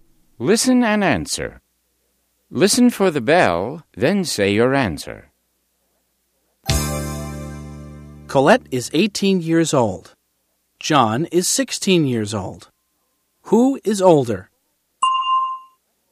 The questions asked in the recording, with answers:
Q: Who is older?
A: Colette is. Colette is older than John.